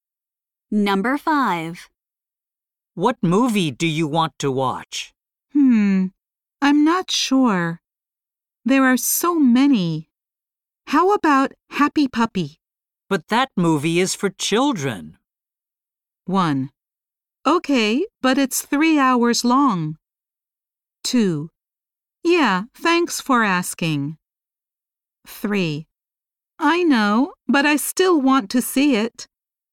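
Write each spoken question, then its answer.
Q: But that movie is for children.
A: 3: I know, but I still want to see it.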